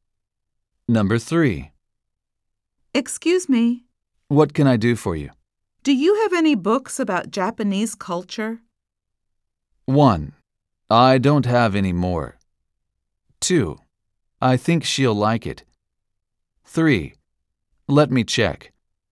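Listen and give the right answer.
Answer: 3: Let me check.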